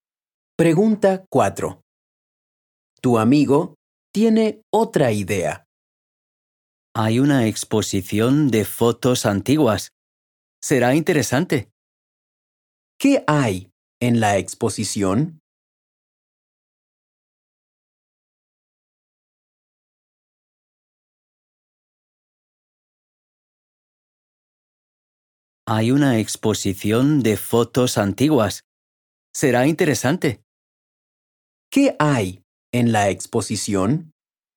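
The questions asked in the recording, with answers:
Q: ¿Qué hay en la exposición?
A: Fotos antiguas.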